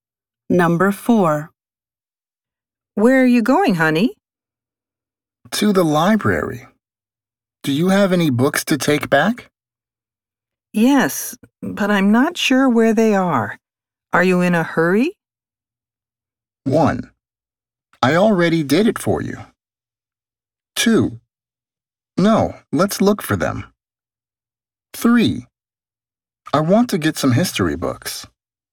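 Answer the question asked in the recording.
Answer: 2: No, let's look for them.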